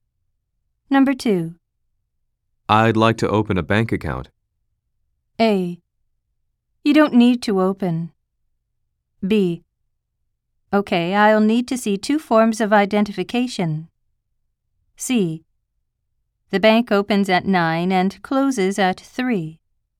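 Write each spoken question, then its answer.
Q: I'd like to open a bank account.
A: B: Okay, I'll need to see two forms of identification.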